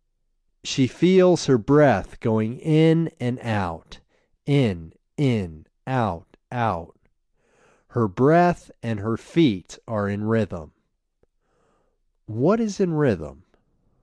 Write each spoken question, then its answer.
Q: What is in rhythm?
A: Her breath and feet are in rhythm.